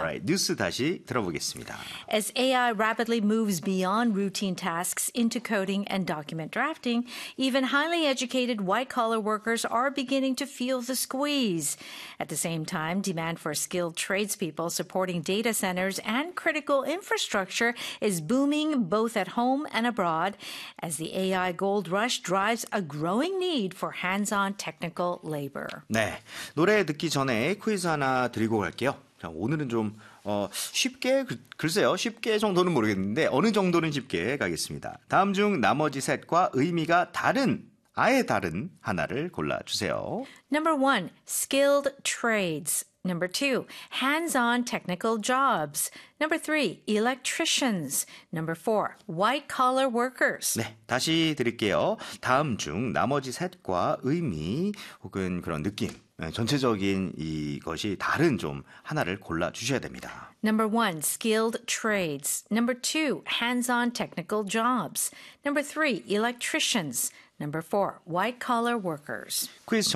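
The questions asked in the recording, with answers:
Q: 다음 중 나머지 셋과 의미가 다른, 아예 다른 하나를 골라주세요.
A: 4: white-collar workers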